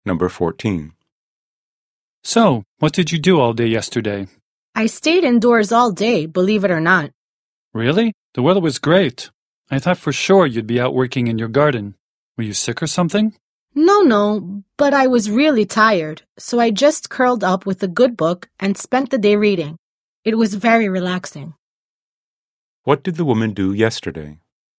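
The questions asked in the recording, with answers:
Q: What did the woman do yesterday?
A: She stayed indoors all day reading a book.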